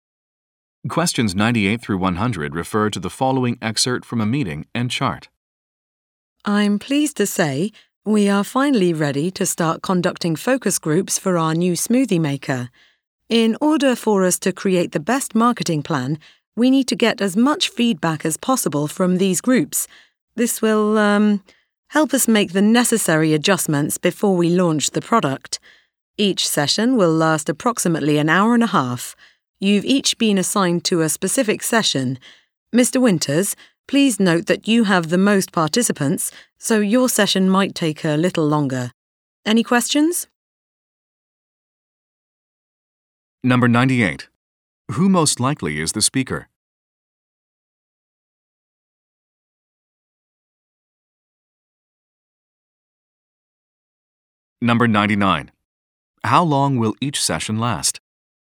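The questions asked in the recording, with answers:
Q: How long will each session last?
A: About an hour and a half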